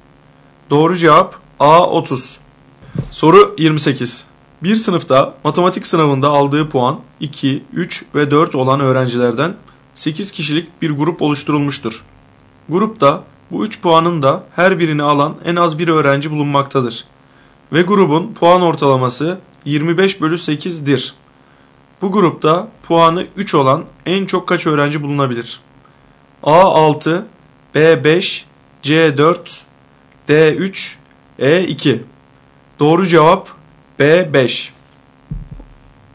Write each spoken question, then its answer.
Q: Bu grupta puanı 3 olan en çok kaç öğrenci bulunabilir?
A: Doğru cevap B 5.